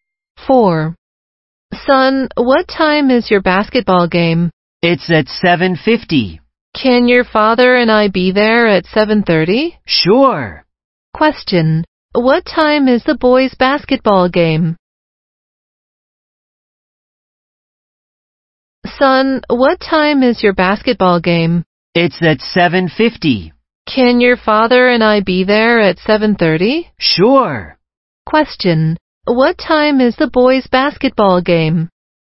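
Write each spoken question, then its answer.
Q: What time is the boys' basketball game?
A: At 7:50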